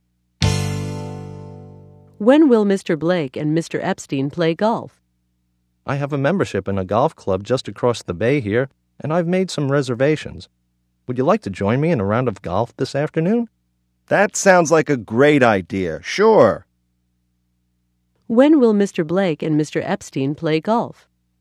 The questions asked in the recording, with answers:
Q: When will Mr. Blake and Mr. Epstein play golf?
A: They'll play this afternoon.